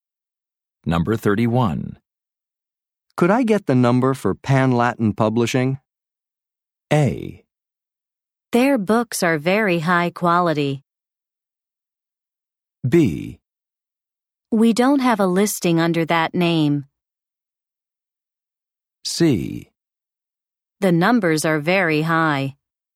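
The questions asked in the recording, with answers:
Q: Could I get the number for Pan Latin Publishing?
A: B: We don't have a listing under that name.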